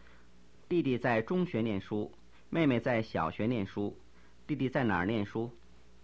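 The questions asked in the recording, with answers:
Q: 弟弟在哪儿念书?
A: 中学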